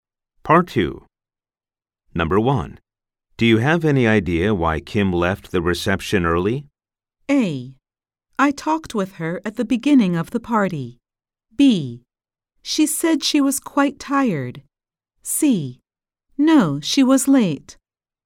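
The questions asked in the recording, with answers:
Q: Do you have any idea why Kim left the reception early?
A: B: She said she was quite tired.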